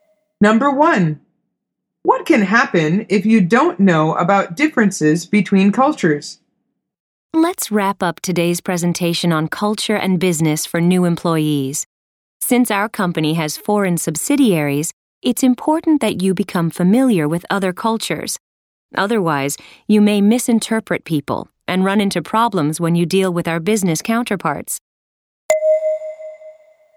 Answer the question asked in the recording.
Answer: The answer is you might misinterpret people.